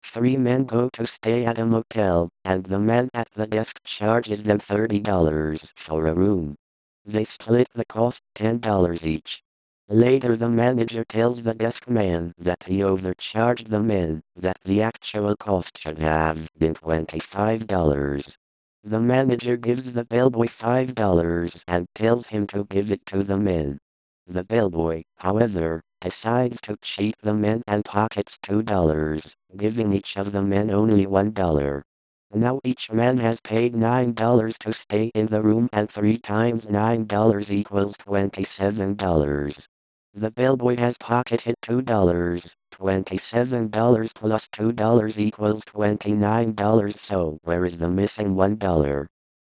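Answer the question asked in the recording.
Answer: No dollar is missing: the $27 the men paid already includes the bellboy's $2 ($25 room + $2), so you should add the $3 returned to get $30.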